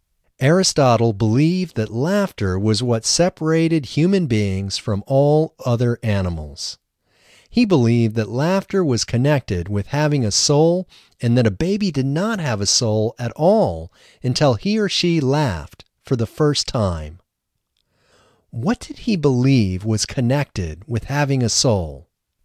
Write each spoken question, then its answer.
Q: What did he believe was connected with having a soul?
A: He believed that laughter was connected with having a soul.